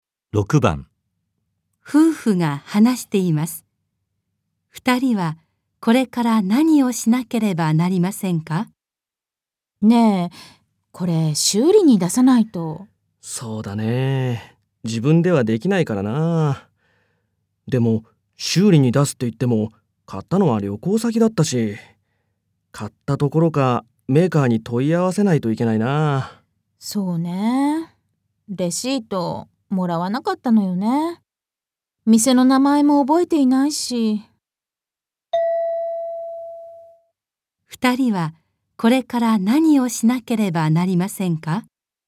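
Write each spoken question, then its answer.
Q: 二人はこれから何をしなければなりませんか?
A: メーカーに問い合わせる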